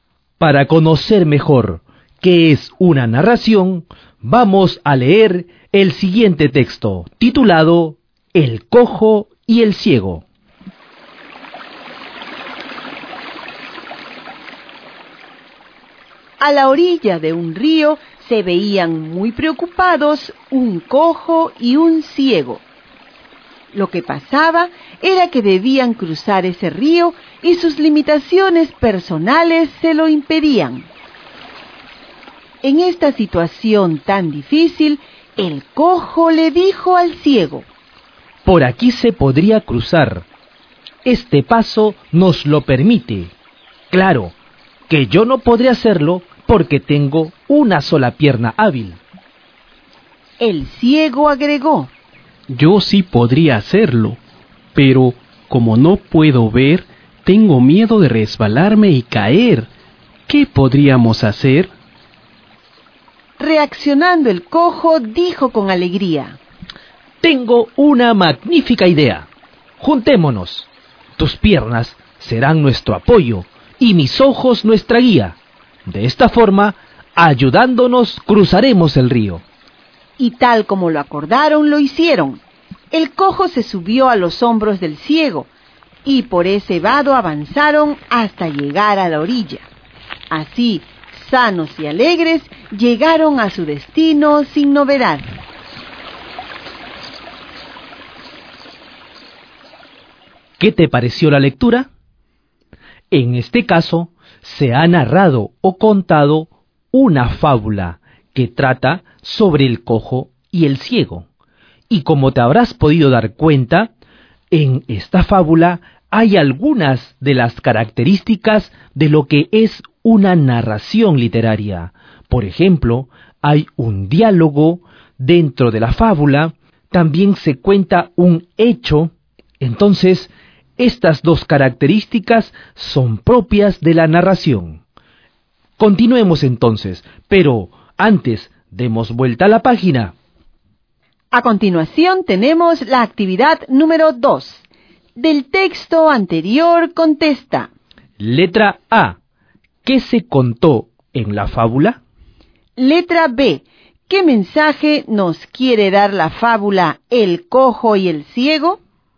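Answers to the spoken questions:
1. Que un cojo y un ciego que no podían cruzar un río se ayudaron: el cojo subió a los hombros del ciego y, juntos, lo cruzaron sanos y salvos.
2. Que si nos ayudamos unos a otros y unimos nuestras capacidades, podemos superar nuestras limitaciones.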